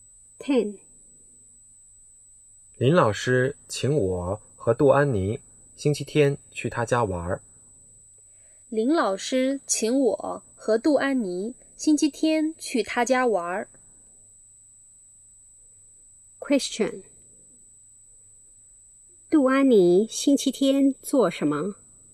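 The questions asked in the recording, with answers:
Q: 杜安妮星期天做什么?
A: 去林老师家玩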